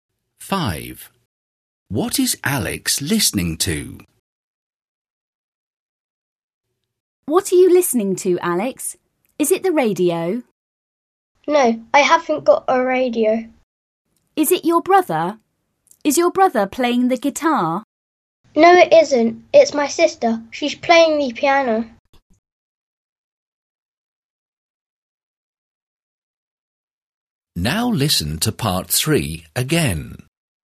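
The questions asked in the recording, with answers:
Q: What is Alex listening to?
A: His sister playing the piano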